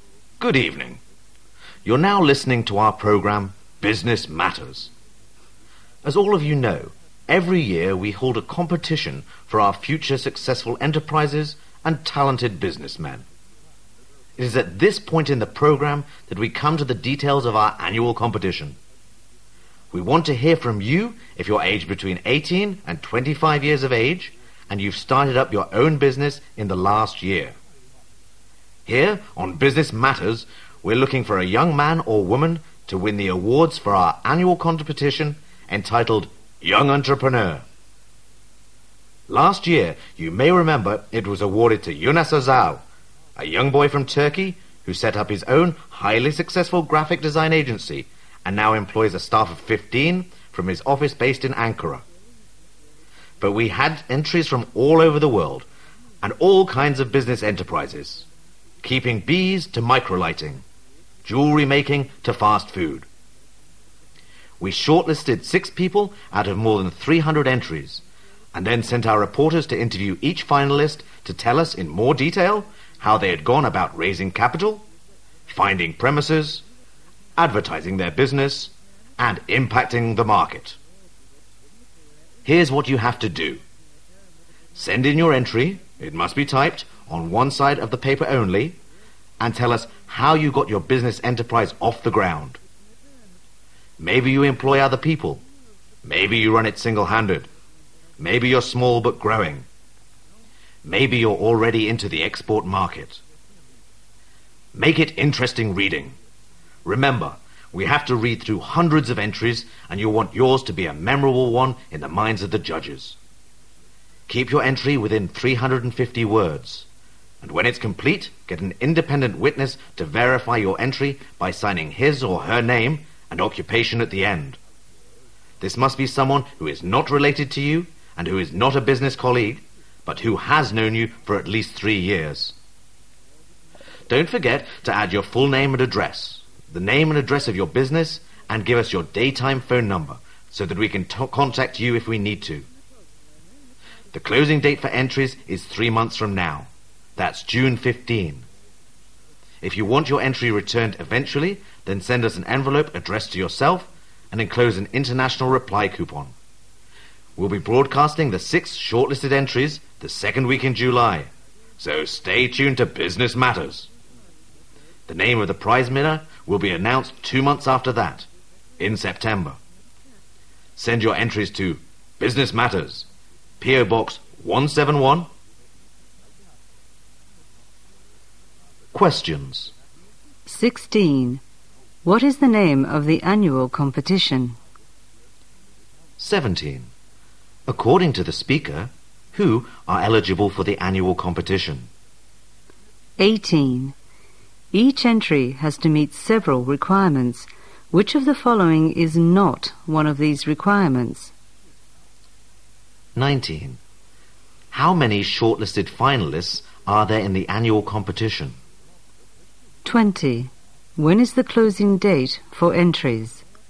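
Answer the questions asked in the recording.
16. Young Entrepreneur
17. People aged 18 to 25 who started their own business in the last year
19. Six
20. June 15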